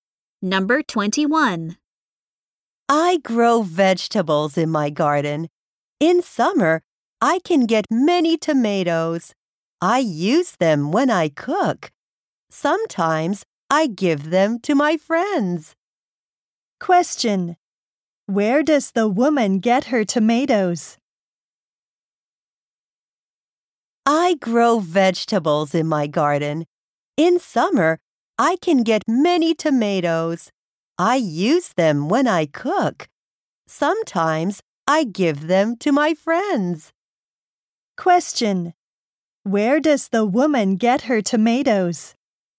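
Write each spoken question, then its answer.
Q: Where does the woman get her tomatoes?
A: From her garden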